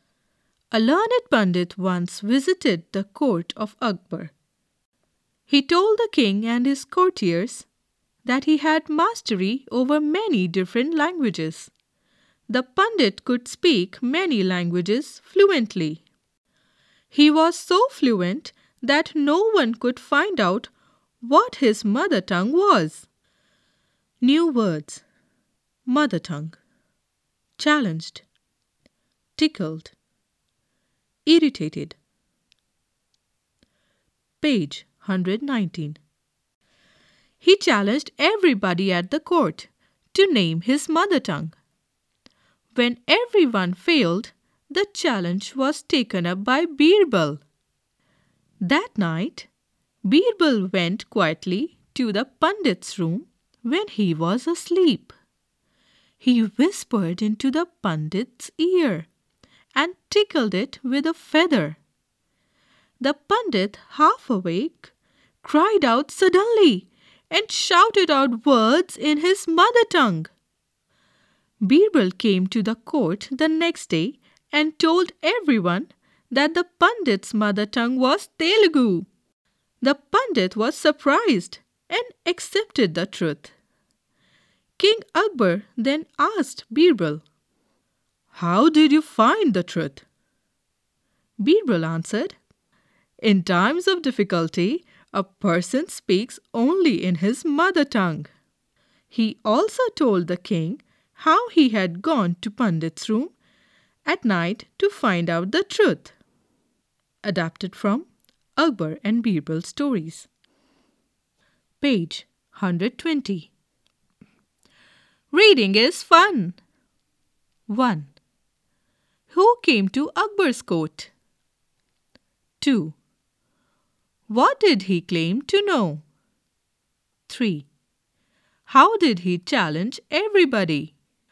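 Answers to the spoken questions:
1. A learned pundit
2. He claimed mastery over many different languages
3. He challenged everybody at the court to name his mother tongue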